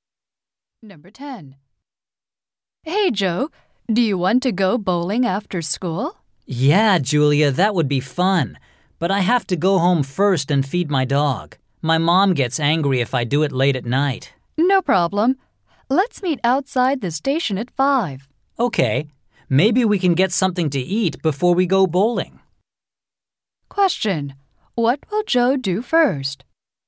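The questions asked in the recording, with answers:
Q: What will Joe do first?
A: Go home and feed his dog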